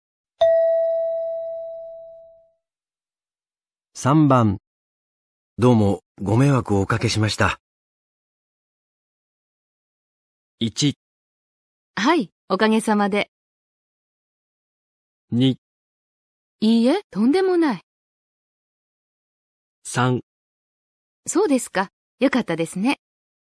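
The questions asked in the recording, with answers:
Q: どうもご迷惑をおかけしました。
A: 2: いいえ、とんでもない。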